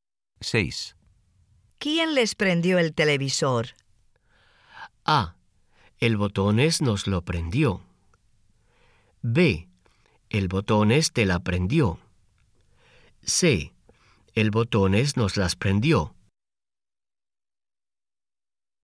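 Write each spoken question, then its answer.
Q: ¿Quién les prendió el televisor?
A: A: El Botones nos lo prendió.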